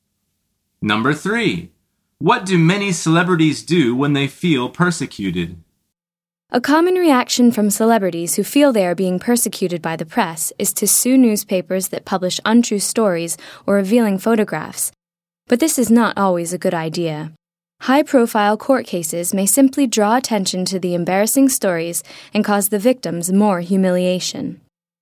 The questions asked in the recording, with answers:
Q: What do many celebrities do when they feel persecuted?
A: The answer is they sue newspapers.